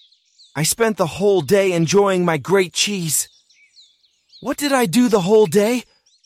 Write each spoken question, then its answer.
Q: What did I do the whole day?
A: I spent the whole day enjoying my cheese.